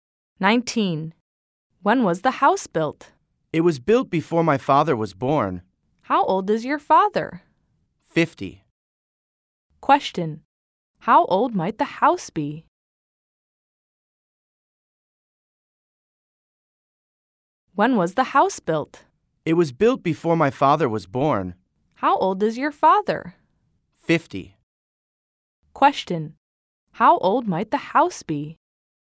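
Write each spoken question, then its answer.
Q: How old might the house be?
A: Over 50 years old.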